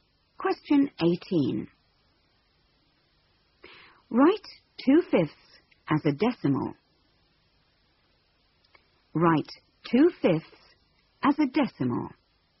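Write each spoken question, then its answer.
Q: Write 2/5 as a decimal.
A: 0.4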